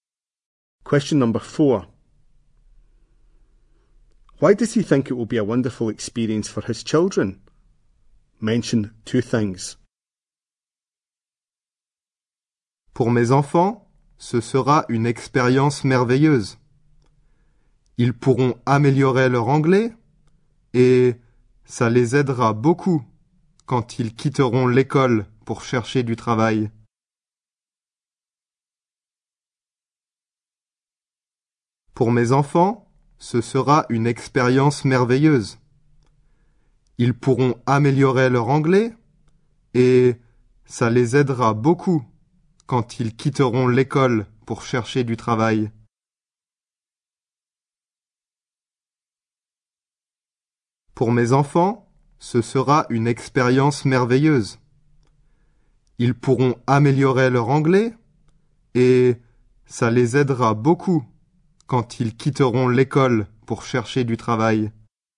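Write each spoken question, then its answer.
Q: Why does he think it will be a wonderful experience for his children?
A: They can improve their English; it will help them find work when they leave school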